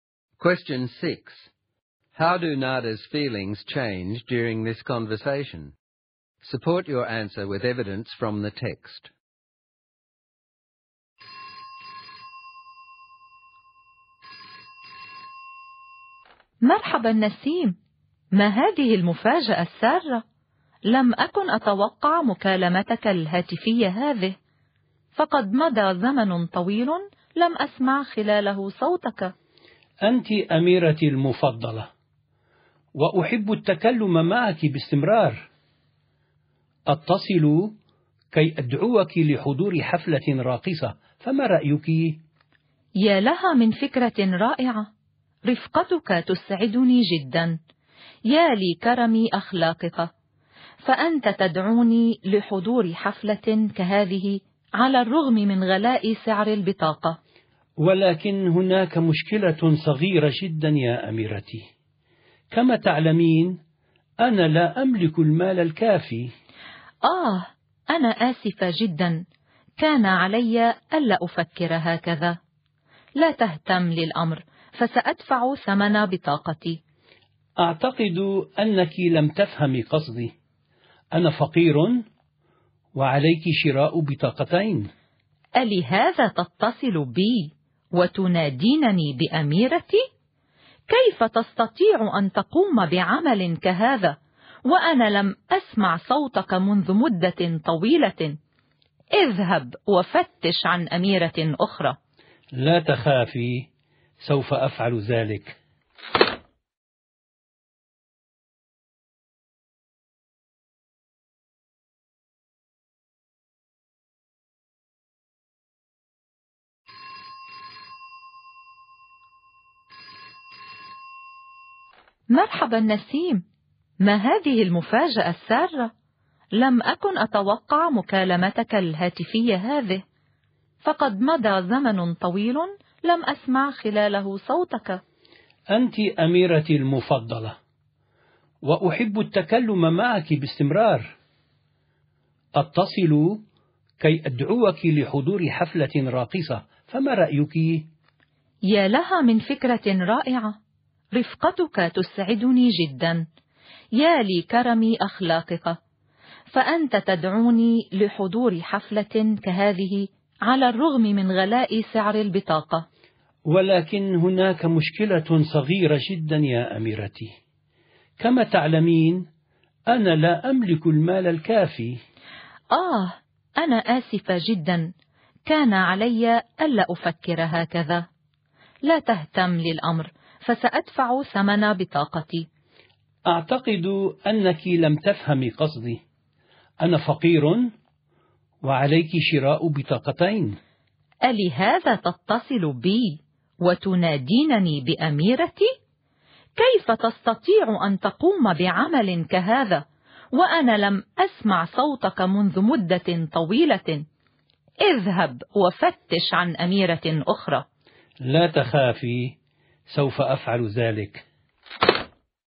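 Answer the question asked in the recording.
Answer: From surprise and delight at the invitation, to embarrassment, to anger when he expects her to pay for both tickets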